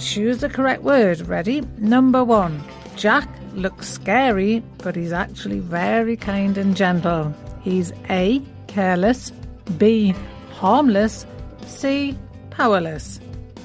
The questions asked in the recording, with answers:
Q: Jack looks scary, but he's actually very kind and gentle. He's A, careless, B, harmless, C, powerless.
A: And the answer is B, harmless.